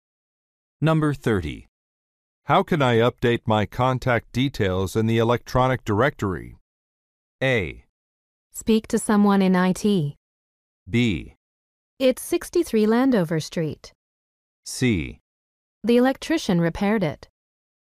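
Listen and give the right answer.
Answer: A: Speak to someone in IT.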